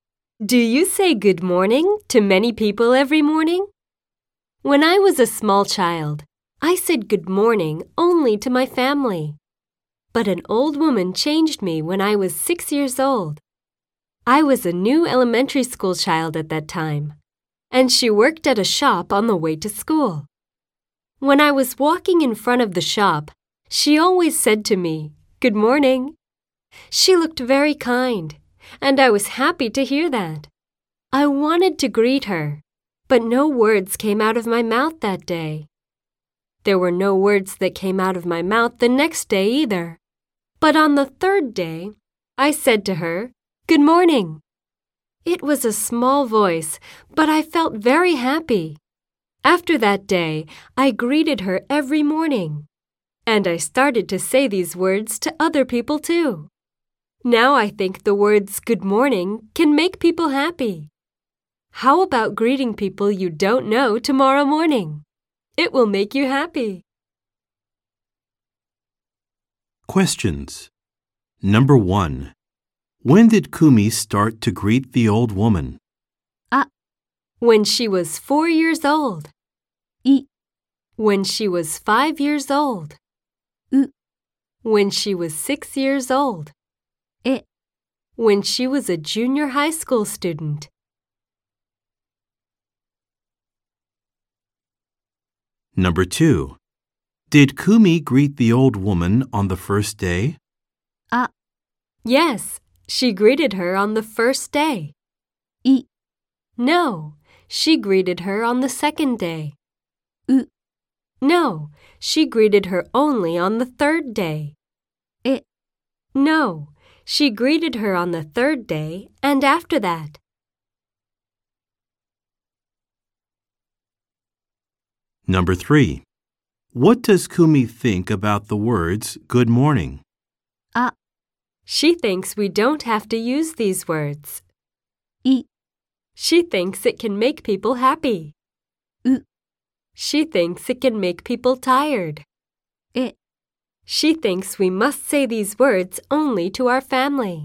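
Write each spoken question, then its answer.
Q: When did Kumi start to greet the old woman?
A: U: When she was 6 years old.

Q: Did Kumi greet the old woman on the first day?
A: E: No, she greeted her on the third day and after that.

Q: What does Kumi think about the words good morning?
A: I: She thinks it can make people happy.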